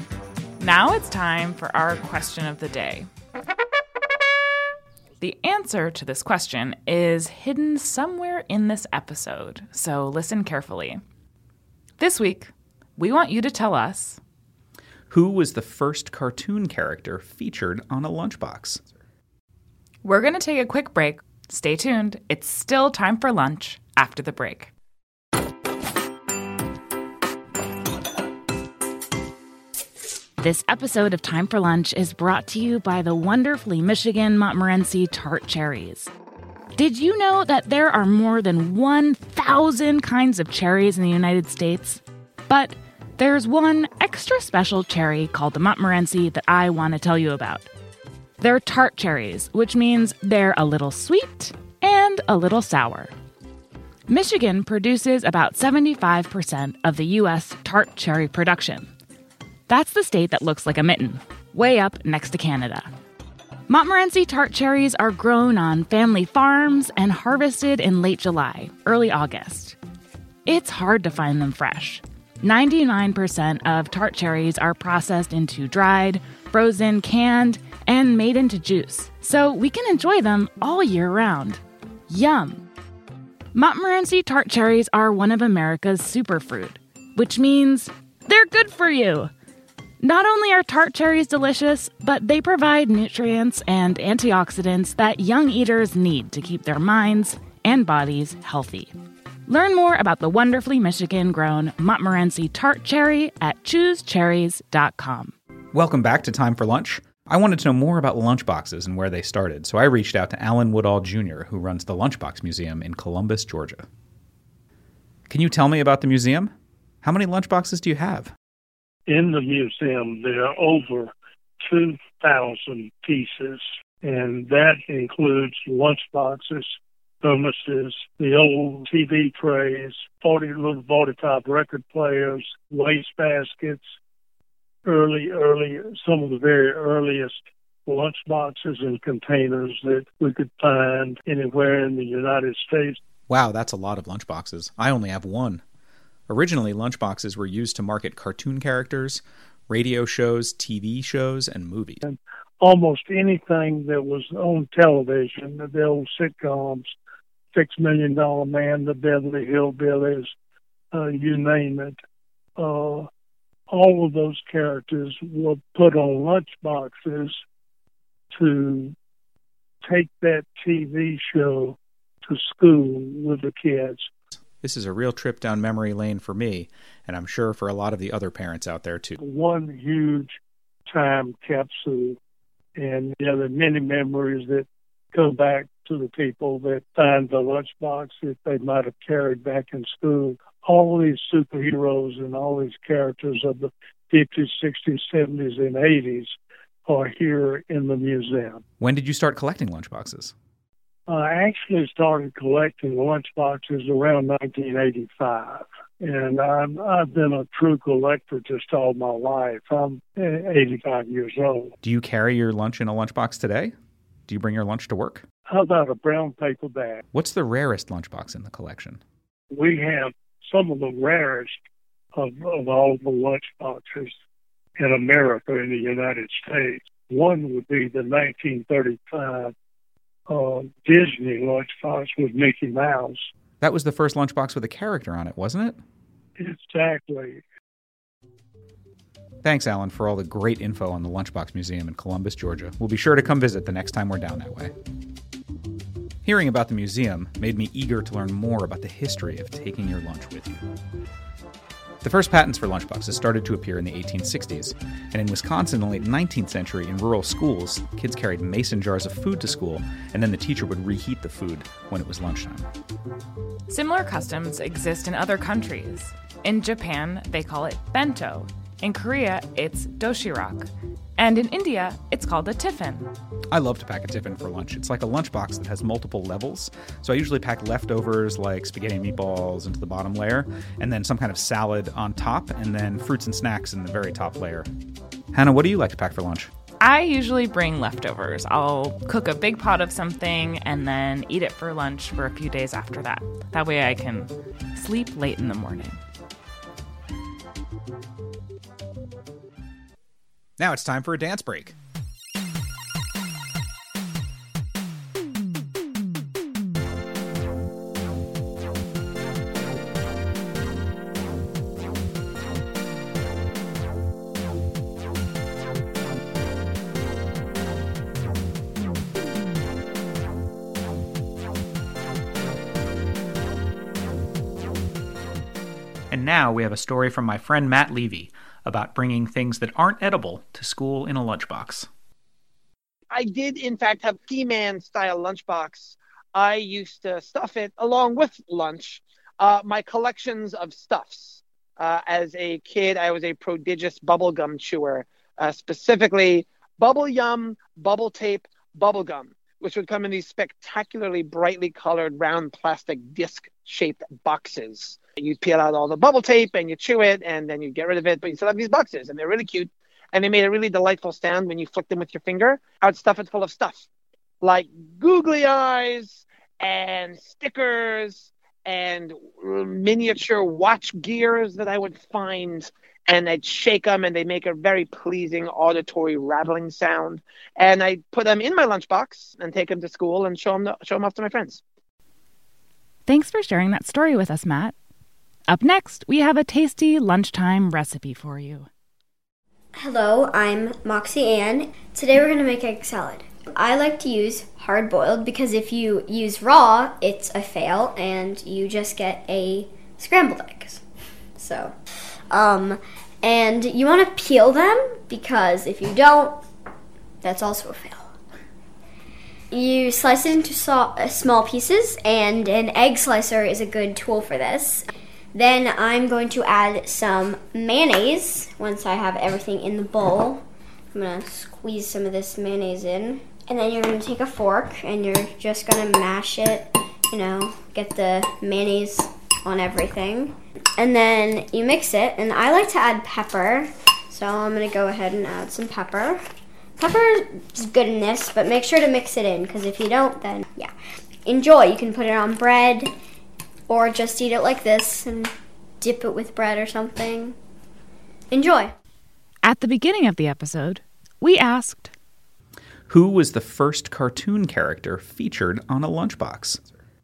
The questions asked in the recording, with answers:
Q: who was the first cartoon character featured on a lunchbox?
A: Disney Lunchbox with Mickey Mouse.